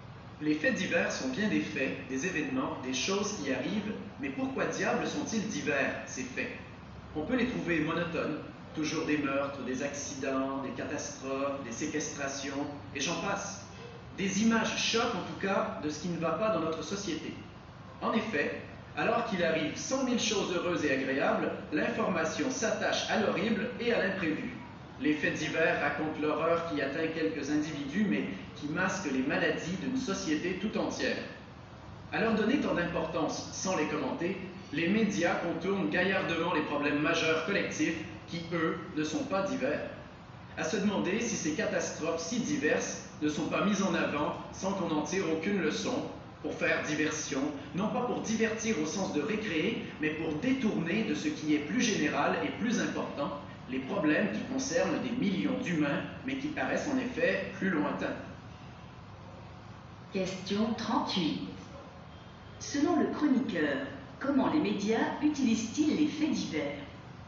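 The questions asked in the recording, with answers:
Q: Selon le chroniqueur, comment les médias utilisent-ils les faits divers?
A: Pour faire diversion : détourner l'attention des problèmes collectifs majeurs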